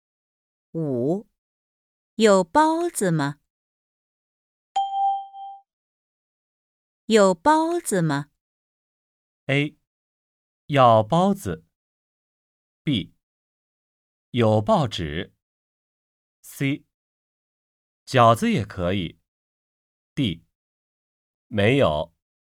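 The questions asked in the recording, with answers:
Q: 有包子吗?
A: D: 没有。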